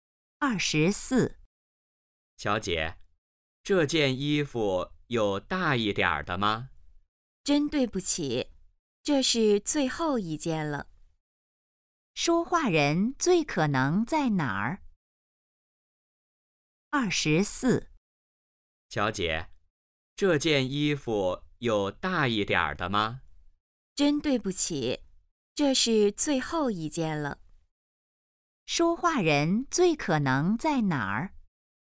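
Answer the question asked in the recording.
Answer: 商店(买衣服)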